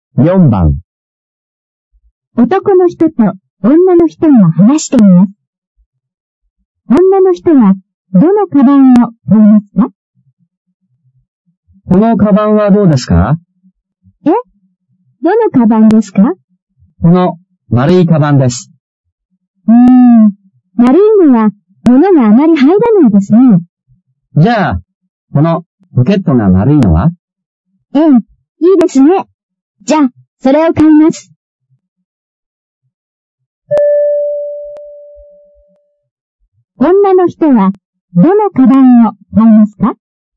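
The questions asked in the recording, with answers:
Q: 女の人は、どのカバンを買いますか?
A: ポケットが丸いカバン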